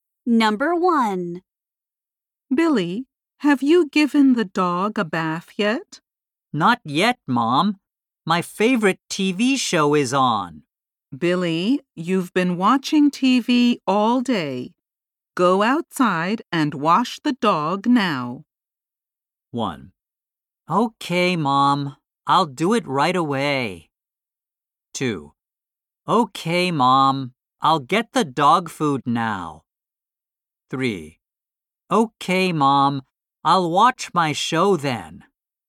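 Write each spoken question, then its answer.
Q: Go outside and wash the dog now.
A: 1: Okay, Mom. I'll do it right away.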